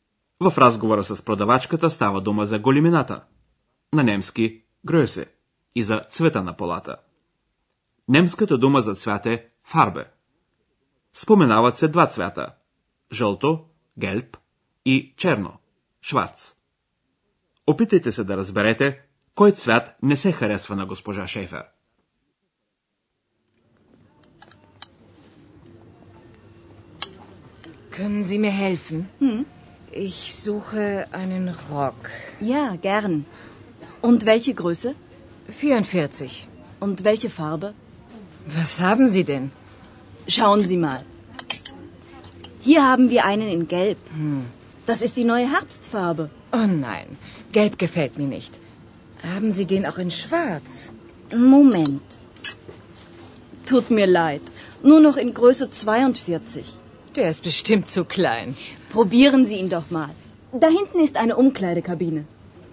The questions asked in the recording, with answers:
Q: Опитайте се да разберете кой цвят не се харесва на госпожа Шейфер.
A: Госпожа Шефер не харесва жълтия цвят.